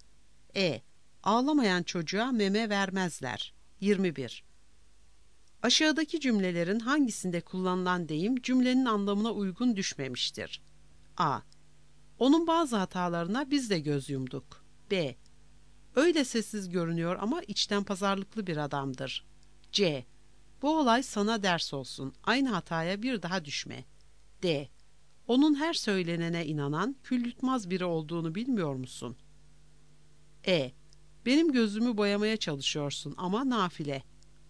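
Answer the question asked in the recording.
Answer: D: Onun her söylenene inanan, kül yutmaz biri olduğunu bilmiyor musun?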